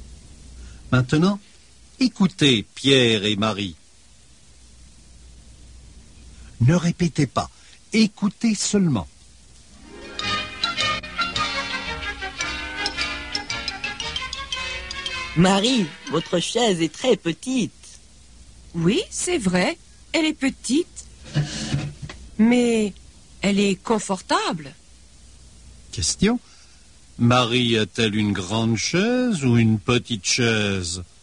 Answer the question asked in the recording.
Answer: Elle a une petite chaise.